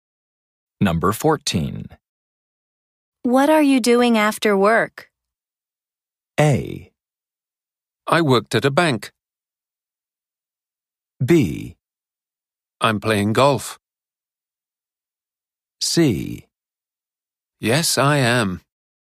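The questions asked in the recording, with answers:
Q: What are you doing after work?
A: B: I'm playing golf.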